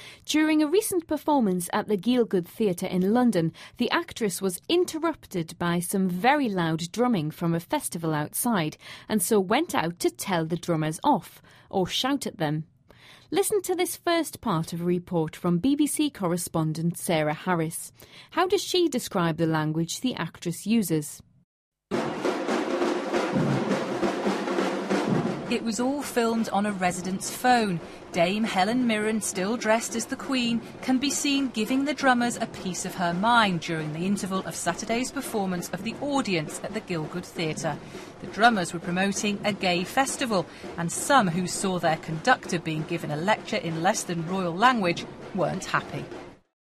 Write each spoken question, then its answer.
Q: How does she describe the language the actress uses?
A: The reporter referred to it as less than royal language.